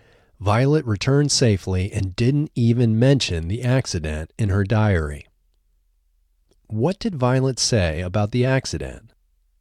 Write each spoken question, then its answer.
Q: What did Violet say about the accident?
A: Violet didn't even mention the accident in her diary.